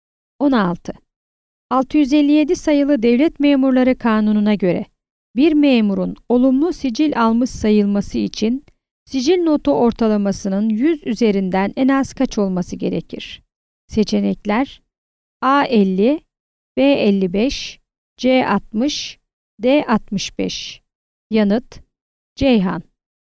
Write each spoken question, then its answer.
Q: 657 sayılı Devlet Memurları Kanunu'na göre bir memurun olumlu sicil almış sayılması için sicil notu ortalamasının 100 üzerinden en az kaç olması gerekir?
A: Yanıt: Ceyhan.